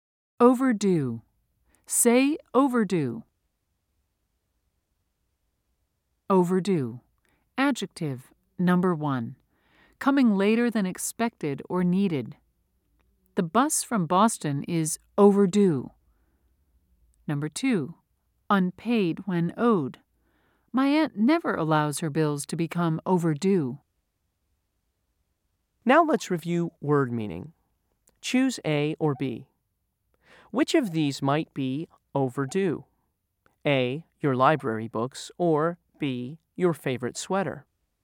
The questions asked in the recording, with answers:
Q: Choose A or B. Which of these might be overdue? A, your library books, or B, your favorite sweater?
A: If you said A, you're correct.